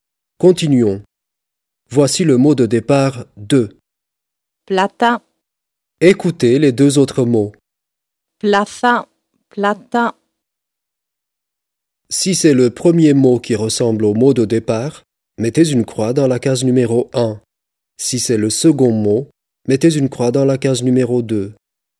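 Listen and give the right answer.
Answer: 2: plata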